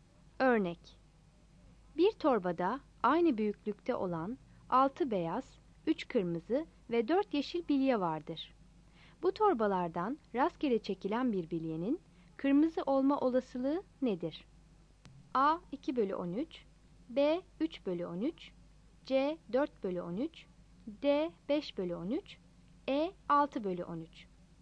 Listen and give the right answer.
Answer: Yanıt B'dir.